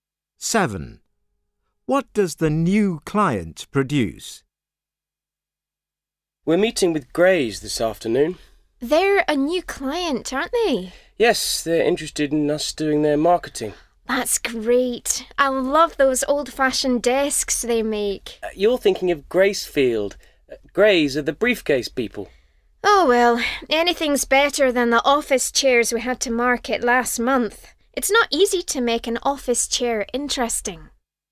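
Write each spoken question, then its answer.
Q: What does the new client produce?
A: Briefcases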